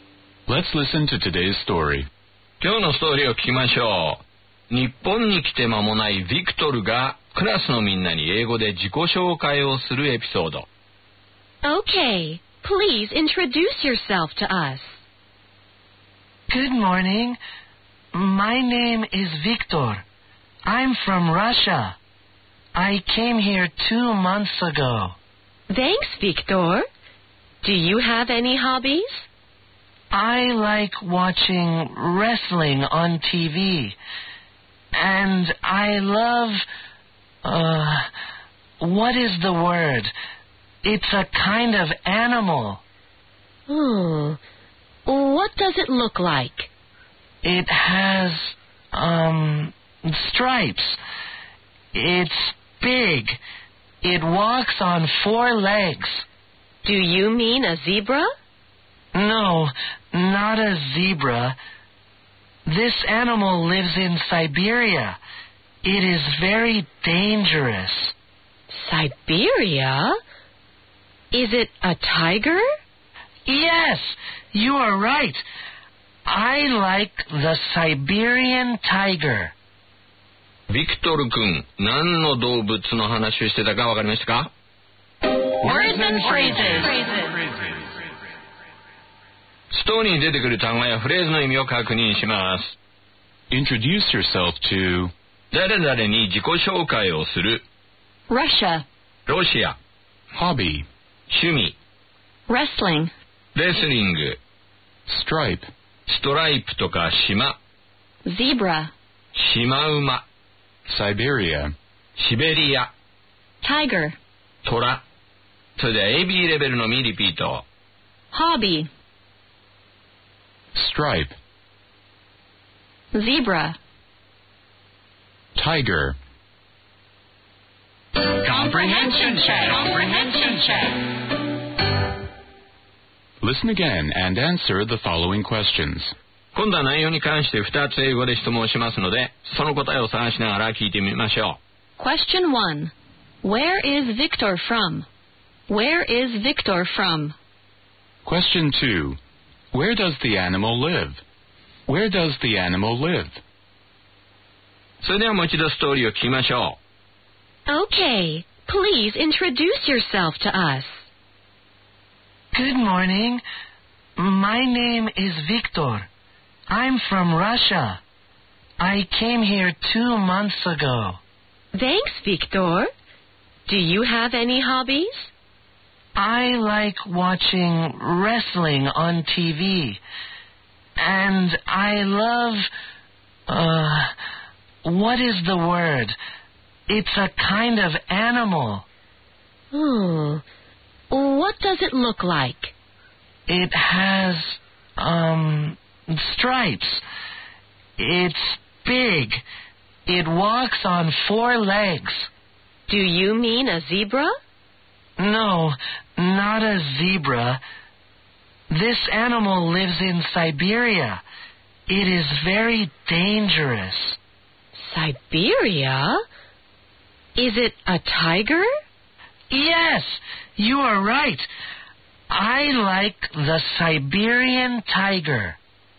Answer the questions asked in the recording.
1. Answer. He's from Russia.
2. Answer. It lives in Siberia.